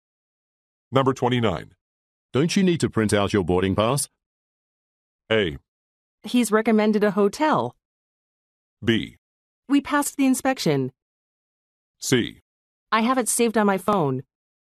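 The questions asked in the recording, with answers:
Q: Don't you need to print out your boarding pass?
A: C: I have it saved on my phone.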